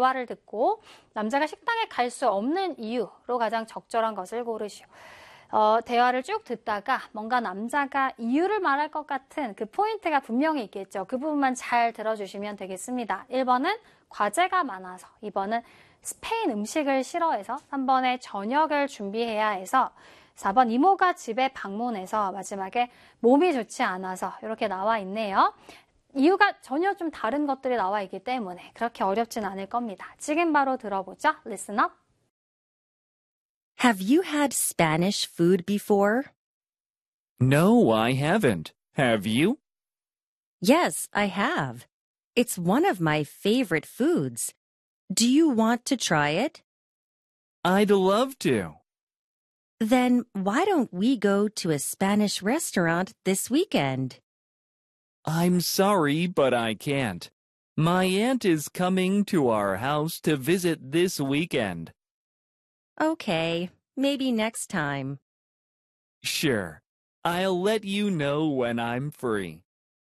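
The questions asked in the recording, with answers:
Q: 대화를 듣고 남자가 식당에 갈수 없는 이유로 가장 적절한 것을 고르시오.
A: 4: 이모가 집에 방문해서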